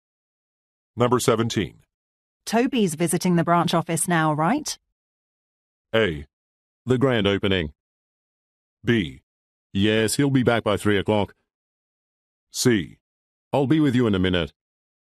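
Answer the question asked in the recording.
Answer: B: Yes, he'll be back by 3 o'clock.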